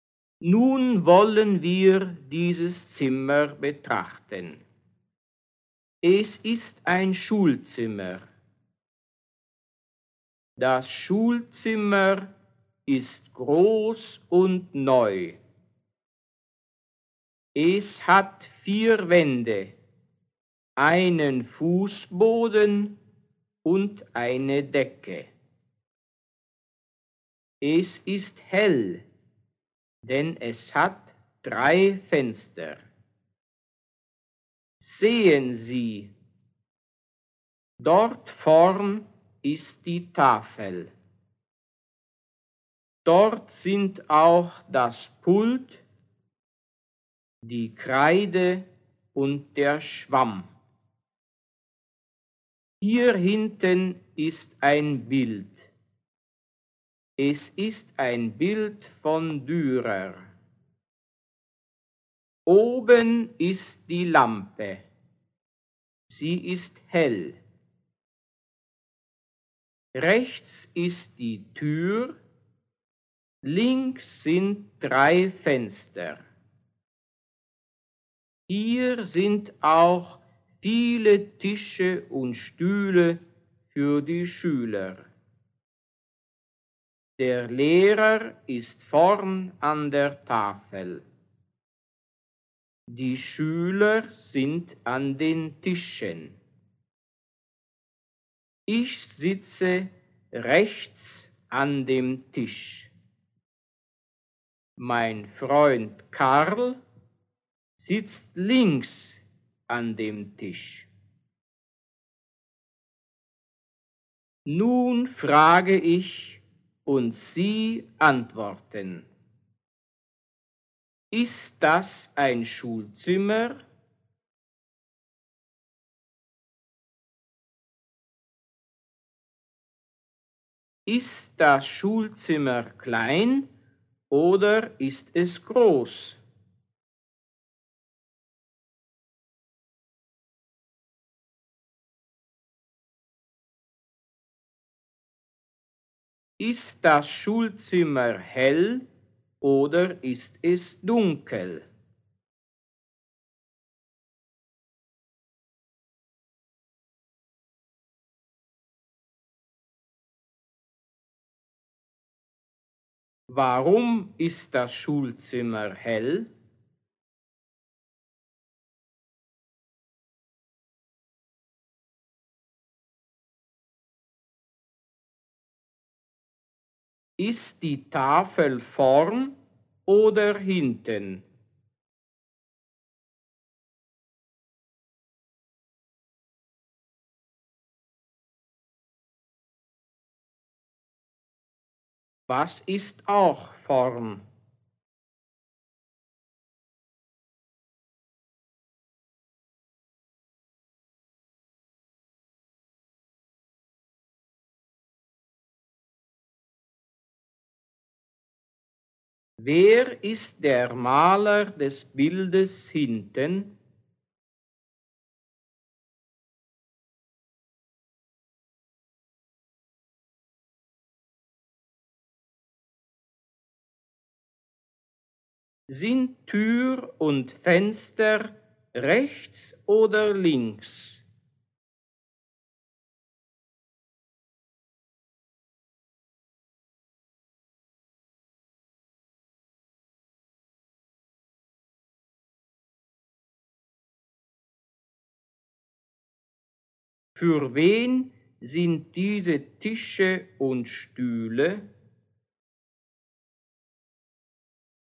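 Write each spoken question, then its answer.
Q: Ist das ein Schulzimmer?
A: Ja, das ist ein Schulzimmer.

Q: Ist das Schulzimmer klein oder ist es groß?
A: Es ist groß.

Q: Ist das Schulzimmer hell oder ist es dunkel?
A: Es ist hell.

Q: Warum ist das Schulzimmer hell?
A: Denn es hat drei Fenster.

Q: Ist die Tafel vorn oder hinten?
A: Die Tafel ist vorn.

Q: Was ist auch vorn?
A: Das Pult, die Kreide und der Schwamm.

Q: Wer ist der Maler des Bildes hinten?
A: Dürer

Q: Sind Tür und Fenster rechts oder links?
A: Die Tür ist rechts, die Fenster sind links.

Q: Für wen sind diese Tische und Stühle?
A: Für die Schüler.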